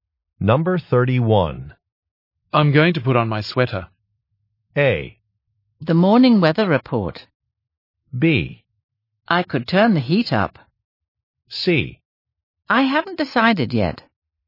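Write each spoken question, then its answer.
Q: I'm going to put on my sweater.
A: B: I could turn the heat up.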